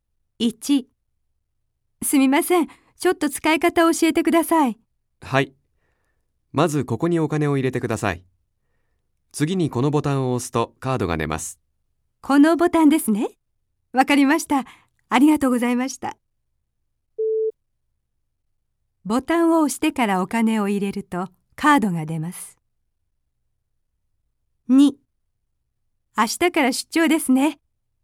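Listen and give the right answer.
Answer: ×(お金を入れてからボタンを押す)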